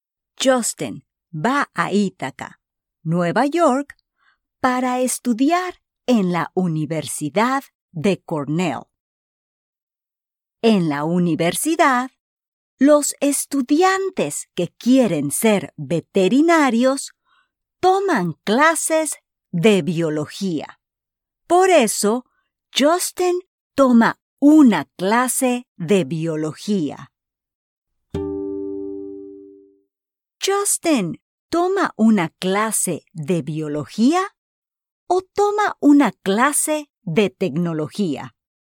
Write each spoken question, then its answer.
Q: Justin toma una clase de biología o toma una clase de tecnología.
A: Correcto. Justin toma una clase de biología porque quiere ser veterinario.